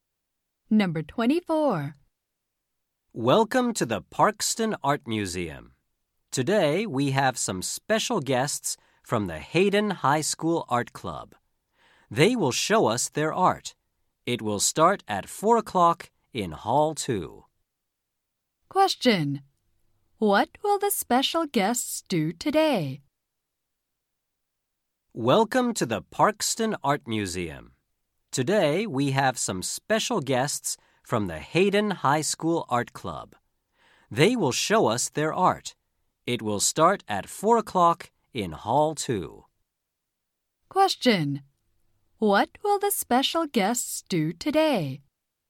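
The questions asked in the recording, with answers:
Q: What will the special guests do today?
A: Show their art.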